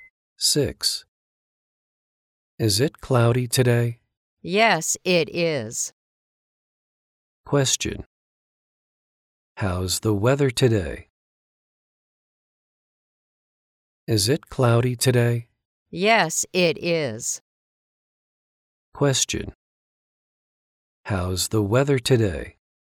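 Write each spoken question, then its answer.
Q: How's the weather today?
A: It's cloudy.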